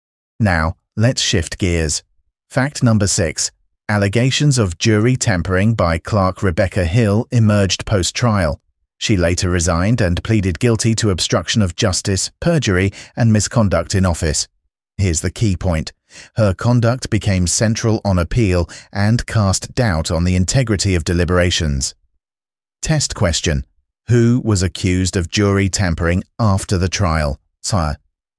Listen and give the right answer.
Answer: Clerk Rebecca Hill.